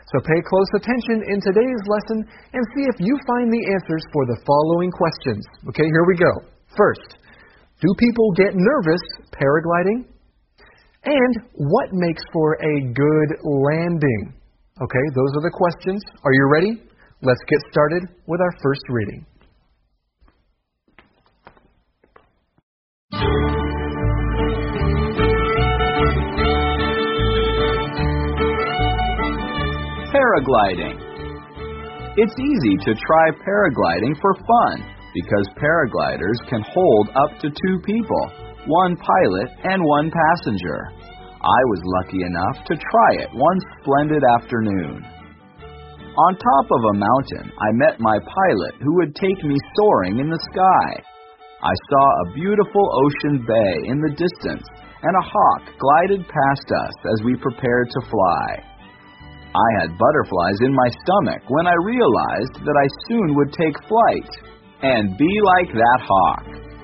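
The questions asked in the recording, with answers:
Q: First, do people get nervous paragliding?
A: Yes, they can get butterflies in their stomach (feel nervous).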